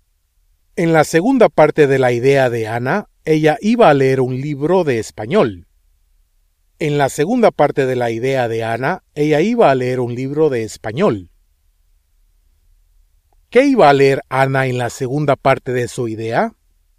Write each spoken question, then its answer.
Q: ¿Qué iba a leer Anna en la segunda parte de su idea?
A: Un libro de español.